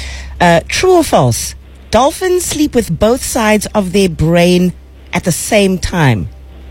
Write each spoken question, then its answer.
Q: True or false? Dolphins sleep with both sides of their brain at the same time.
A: That's actually false there.